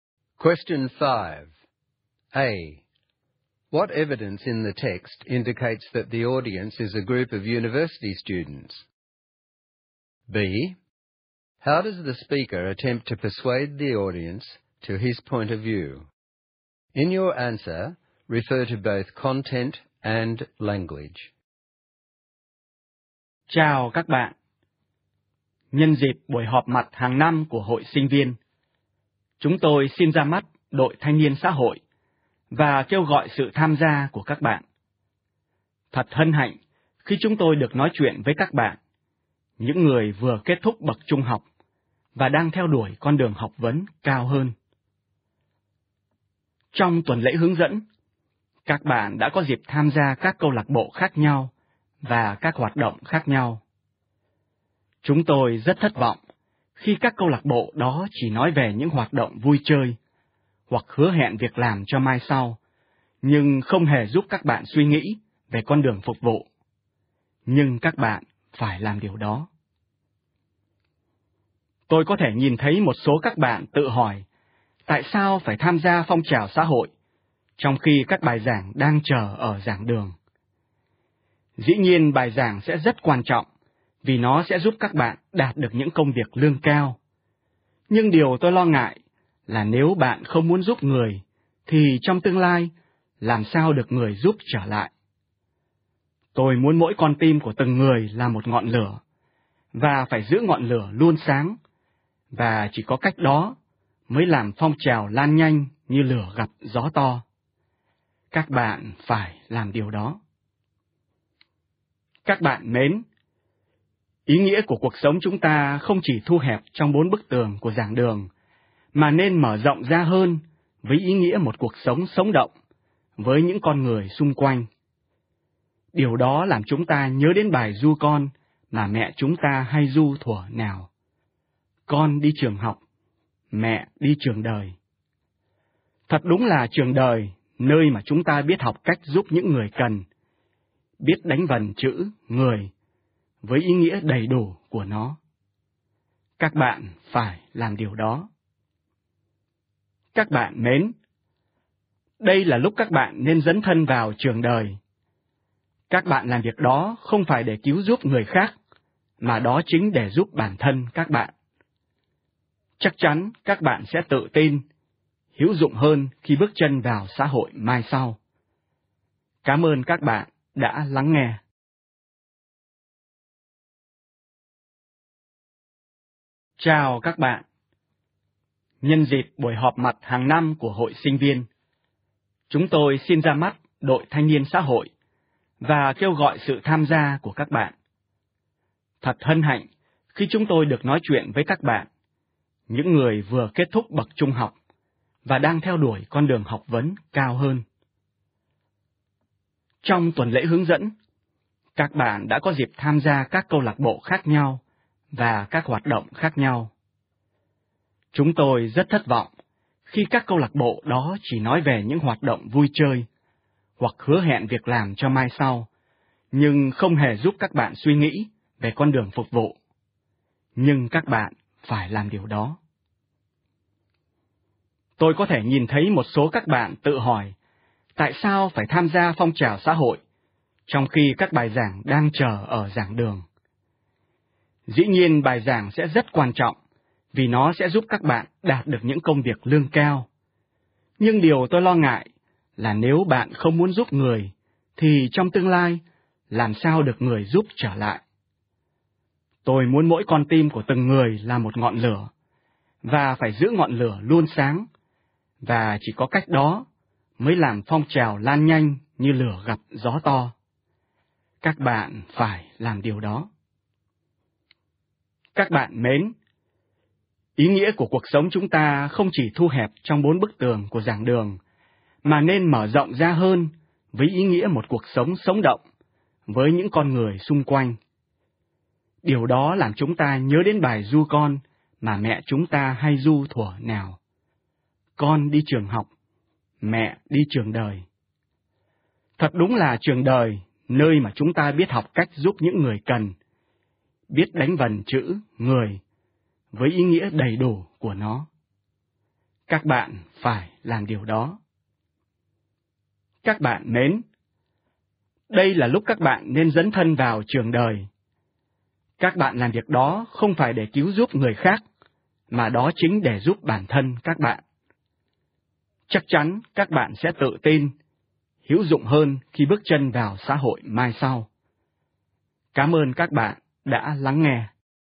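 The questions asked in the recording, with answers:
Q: What evidence in the text indicates that the audience is a group of university students?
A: It is the Student Association's annual meeting; the listeners have just finished high school and are going on to higher study, had orientation week, and have lectures waiting in the lecture halls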